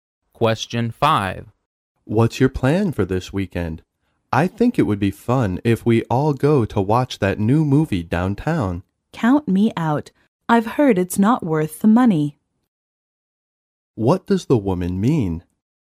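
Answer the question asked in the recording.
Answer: She won't go to the movie because it isn't worth the money.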